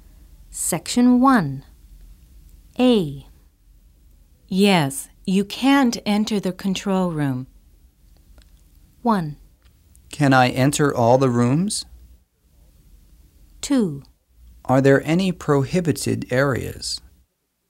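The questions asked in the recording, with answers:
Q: Yes, you can't enter the control room.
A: 2: Are there any prohibited areas?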